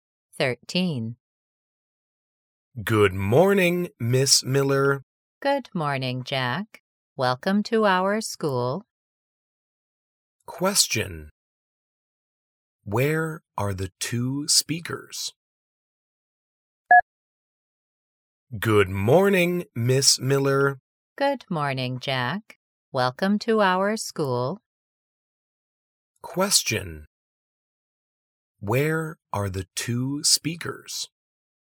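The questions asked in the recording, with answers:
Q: Where are the two speakers?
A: At school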